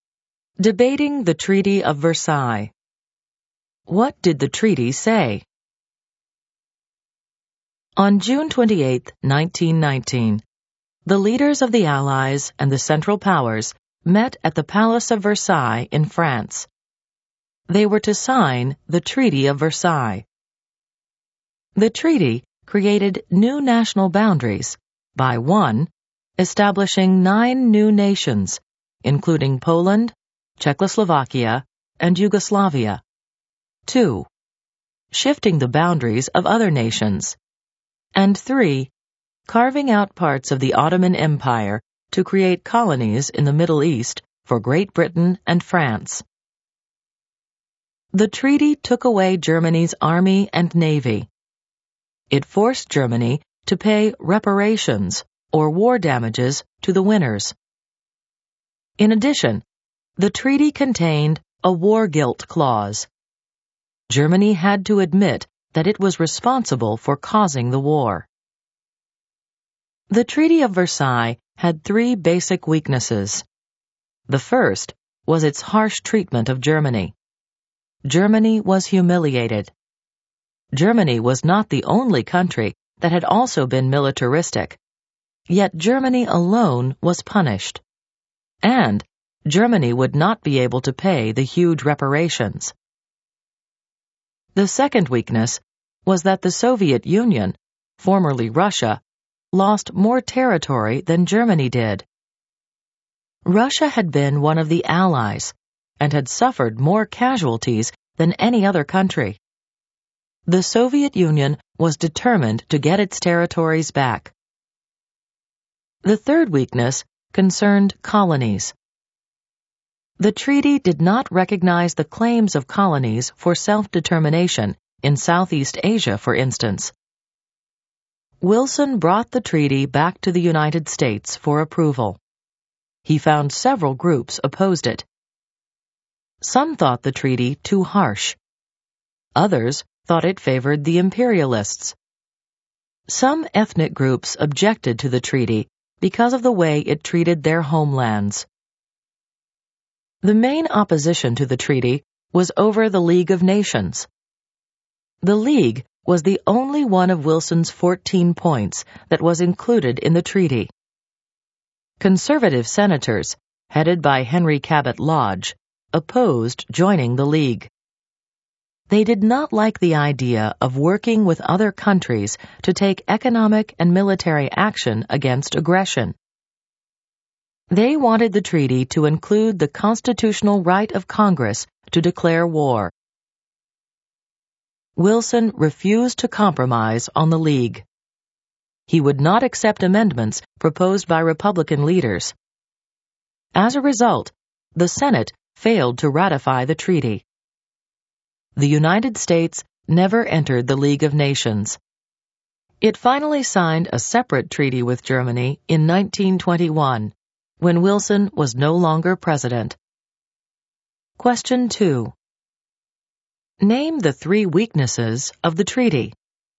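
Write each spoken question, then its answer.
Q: Name the three weaknesses of the treaty.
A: Harsh treatment of Germany; the Soviet Union lost territory; colonies' self-determination claims were ignored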